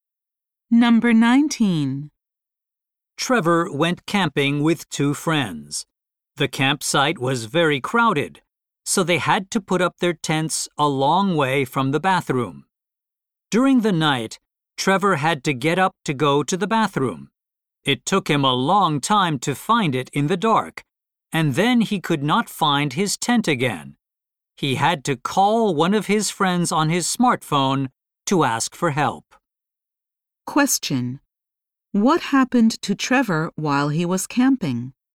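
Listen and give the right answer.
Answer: He could not find his tent in the dark.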